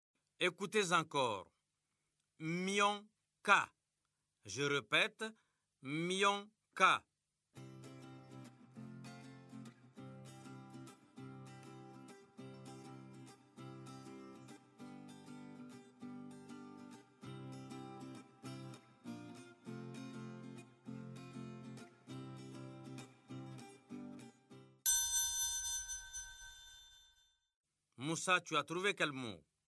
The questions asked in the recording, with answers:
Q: Moussa, tu as trouvé quel mot?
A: Monsieur, c'est camion.